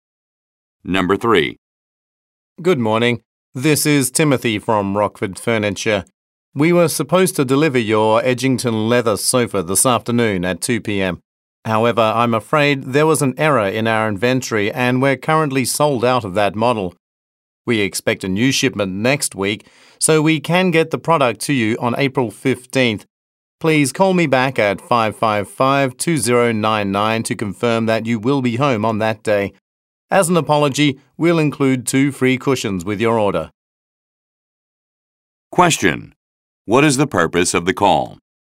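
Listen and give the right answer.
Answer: To report that the sofa delivery is delayed to April 15th because the model is sold out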